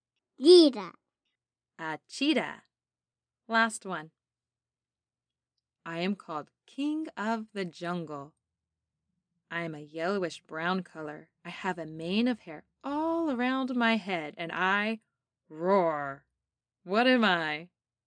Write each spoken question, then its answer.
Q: What am I?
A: Lion.